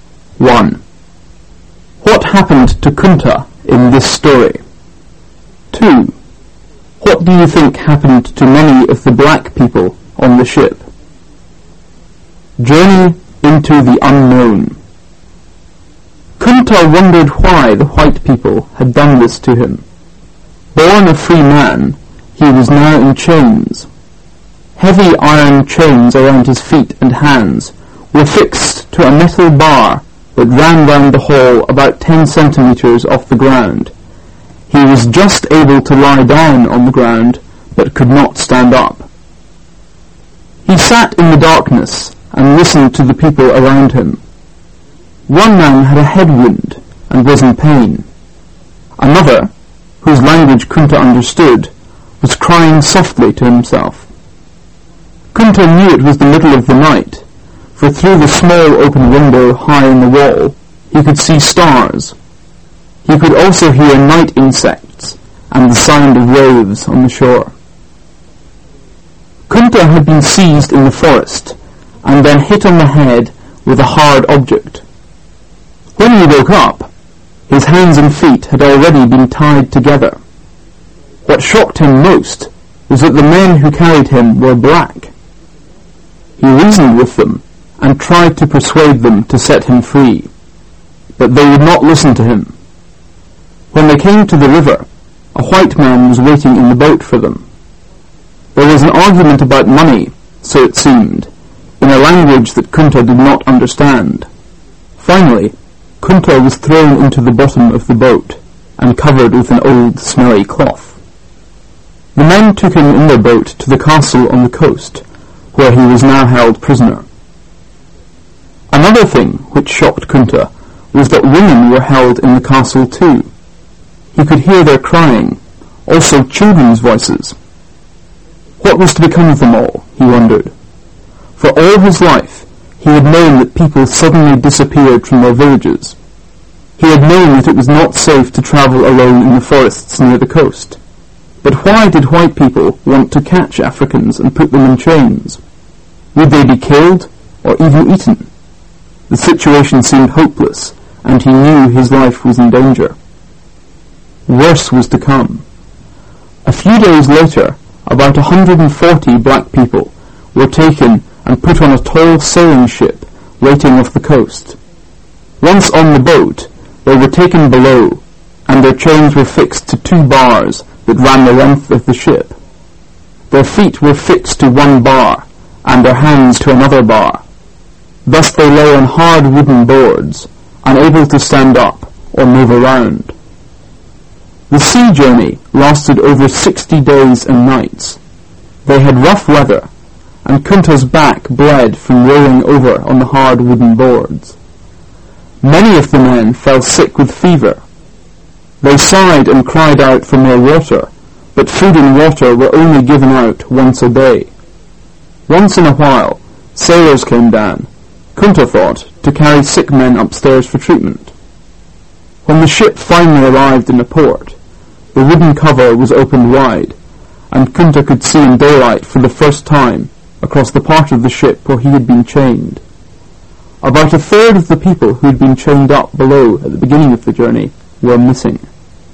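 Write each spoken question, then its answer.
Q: What happened to Kunta in this story?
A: He was captured, chained and taken by ship across the sea as a slave.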